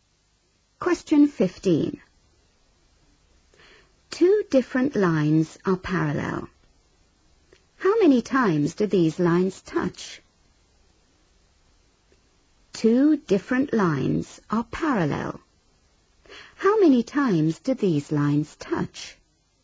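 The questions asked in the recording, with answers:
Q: How many times do these lines touch?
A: 0 (never)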